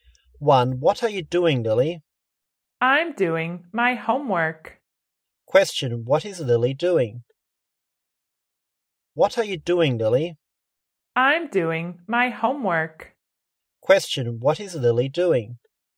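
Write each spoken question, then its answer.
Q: What is Lily doing?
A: Doing her homework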